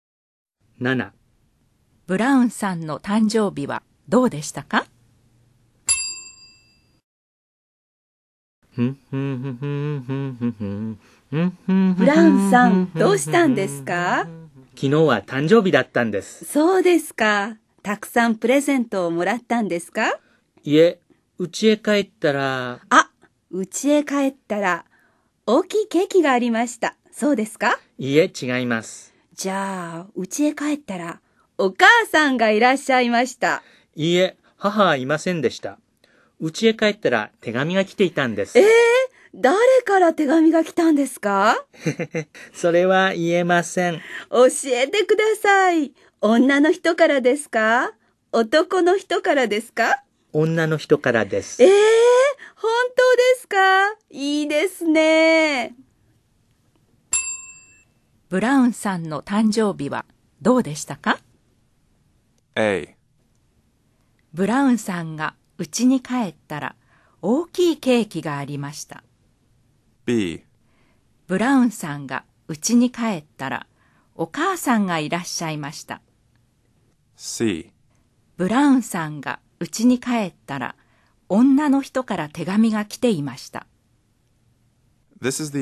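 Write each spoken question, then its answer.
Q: ブラウンさんの誕生日はどうでしたか?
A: C: ブラウンさんが家に帰ったら女の人から手紙が来ていました。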